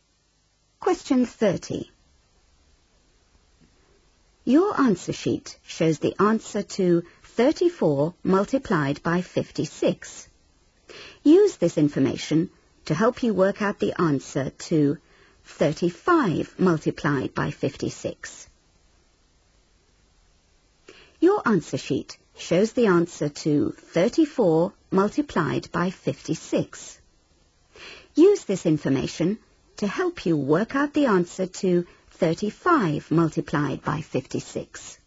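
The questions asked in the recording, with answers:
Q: Use this information to help you work out the answer to 35 multiplied by 56.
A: 1960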